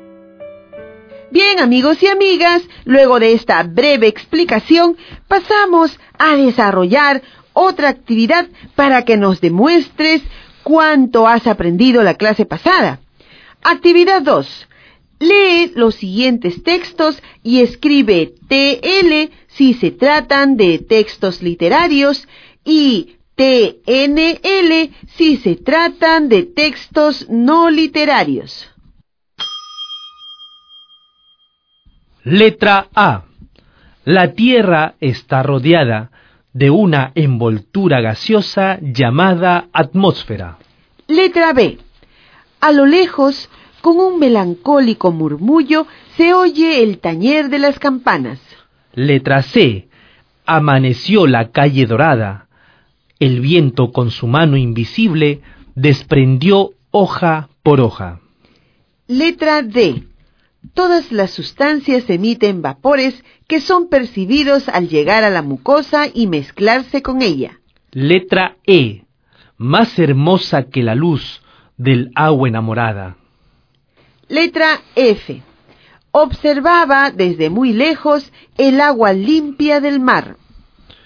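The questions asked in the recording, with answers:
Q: Letra A. La Tierra está rodeada de una envoltura gaseosa llamada atmósfera.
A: TNL

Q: Letra B. A lo lejos, con un melancólico murmullo, se oye el tañer de las campanas.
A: TL

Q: Letra C. Amaneció la calle dorada. El viento con su mano invisible desprendió hoja por hoja.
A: TL

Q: Letra D. Todas las sustancias emiten vapores que son percibidos al llegar a la mucosa y mezclarse con ella.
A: TNL

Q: Letra E. Más hermosa que la luz del agua enamorada.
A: TL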